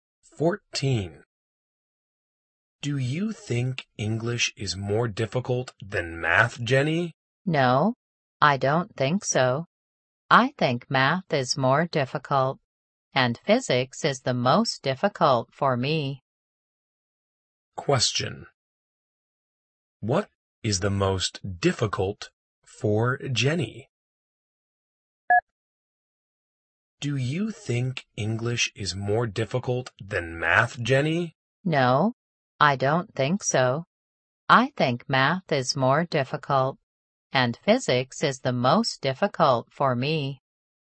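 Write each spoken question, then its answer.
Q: What is the most difficult for Jenny?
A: Physics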